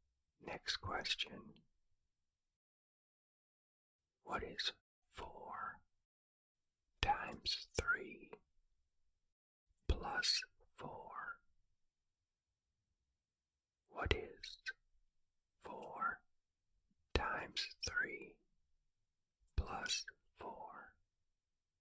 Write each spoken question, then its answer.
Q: What is 4 times 3 plus 4?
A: The answer is 16.